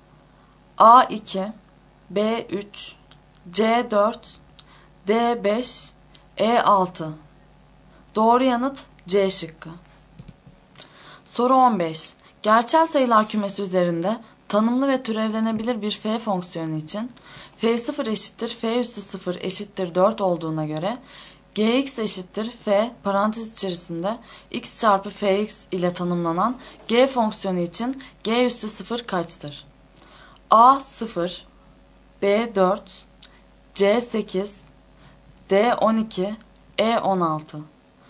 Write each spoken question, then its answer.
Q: Gerçel sayılar kümesi üzerinde tanımlı ve türevlenebilir bir f fonksiyonu için f 0 eşittir f üssü 0 eşittir 4 olduğuna göre gx eşittir f parantez içerisinde x çarpı fx ile tanımlanan g fonksiyonu için g üssü 0 kaçtır?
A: Doğru yanıt E şıkkı.